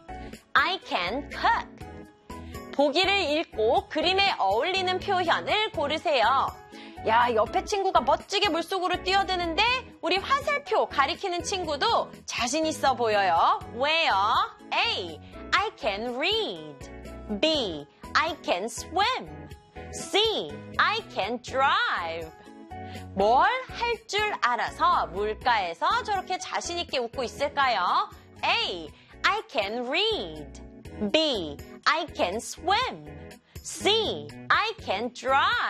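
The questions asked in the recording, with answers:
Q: 뭘 할 줄 알아서 물가에서 저렇게 자신 있게 웃고 있을까요?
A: B: I can swim.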